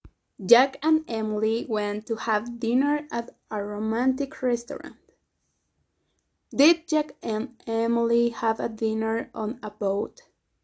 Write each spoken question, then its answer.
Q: Did Jack and Emily have a dinner on a boat?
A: No, no, <laughs> not a boat.